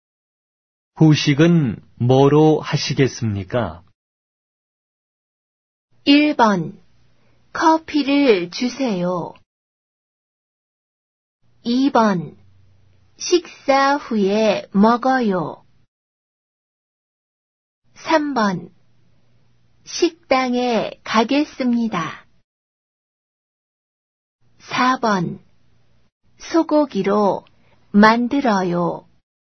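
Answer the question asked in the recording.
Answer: 1: 커피를 주세요.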